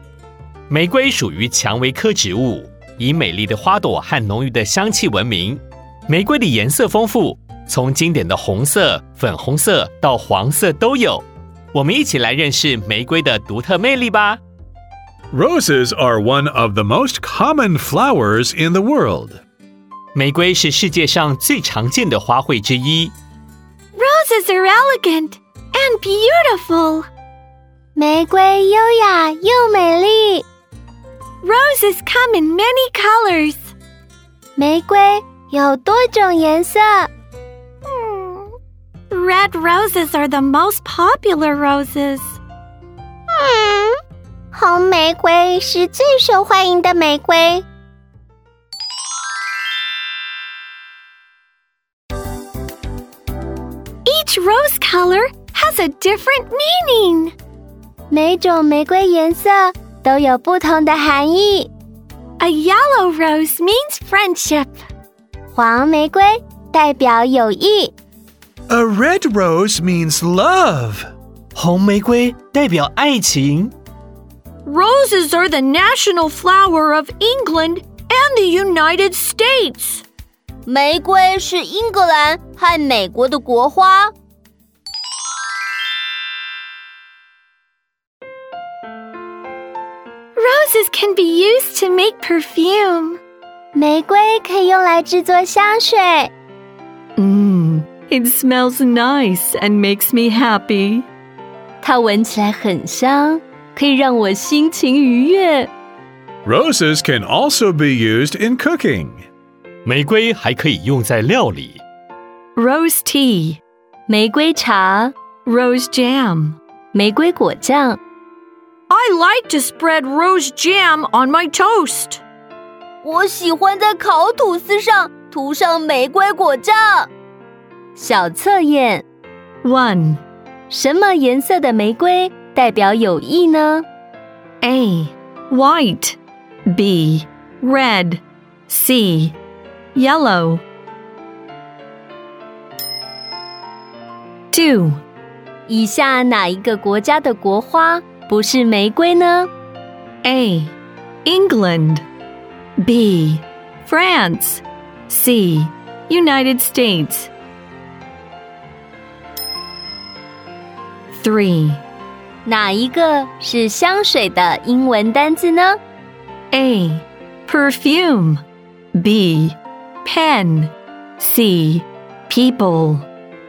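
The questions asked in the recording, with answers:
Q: 什么颜色的玫瑰代表友谊呢?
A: C: Yellow

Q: 以下哪一个国家的国花不是玫瑰呢?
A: B: France

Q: 哪一个是香水的英文单字呢?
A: A: Perfume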